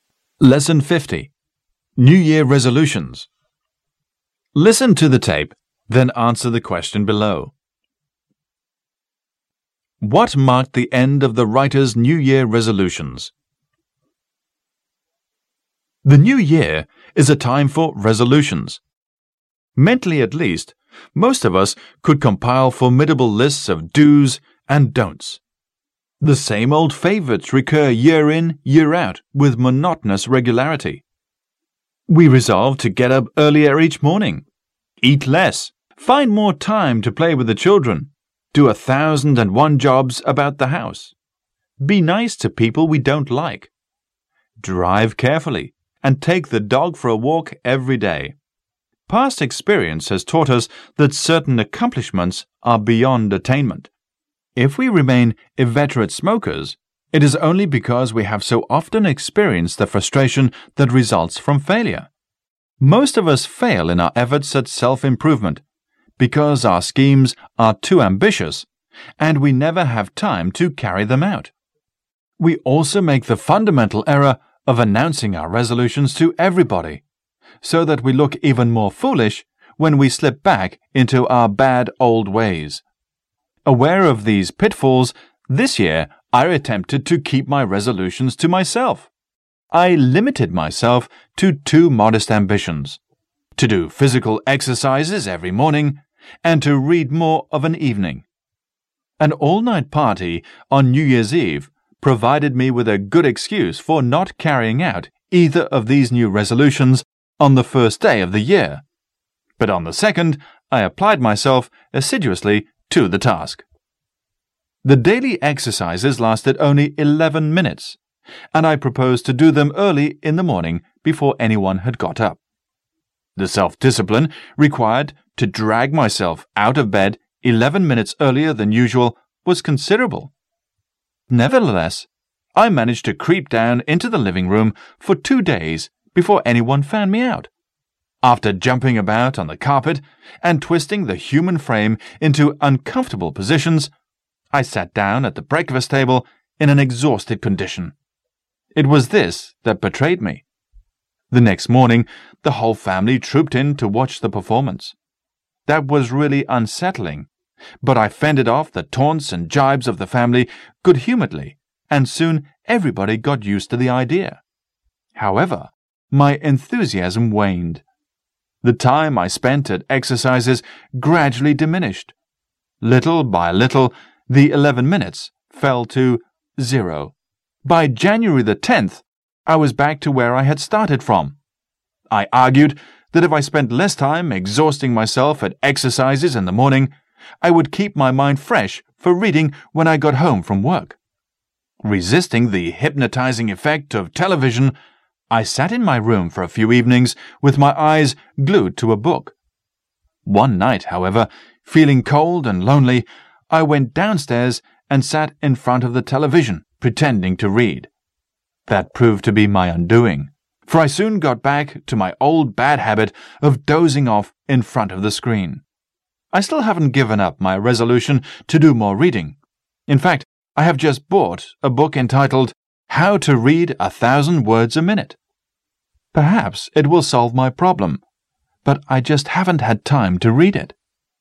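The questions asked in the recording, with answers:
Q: What marked the end of the writer's New Year resolutions?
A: He gave up exercising by January 10th and went back to dozing in front of the television instead of reading.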